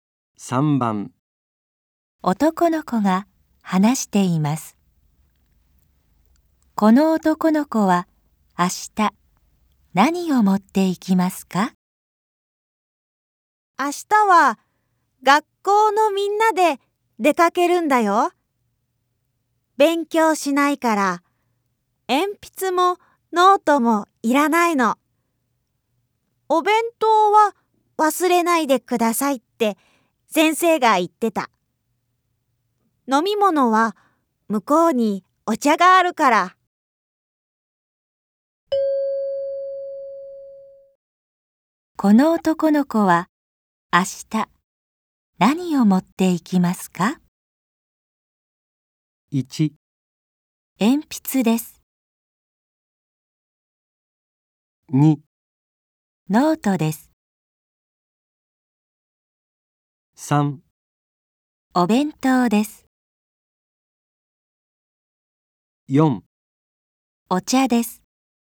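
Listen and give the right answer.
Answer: 3: お弁当です。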